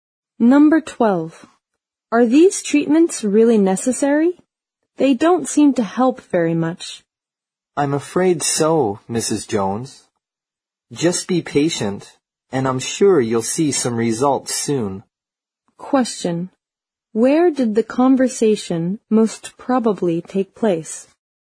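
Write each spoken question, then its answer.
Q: Where did the conversation most probably take place?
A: At a doctor's office or hospital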